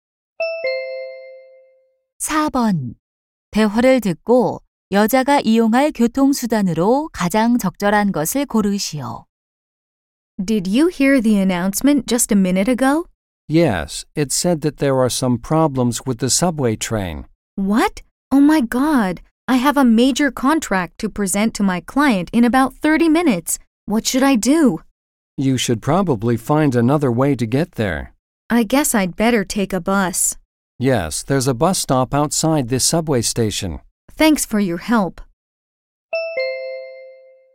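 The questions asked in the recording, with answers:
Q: 대화를 듣고 여자가 이용할 교통수단으로 가장 적절한 것을 고르시오.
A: 버스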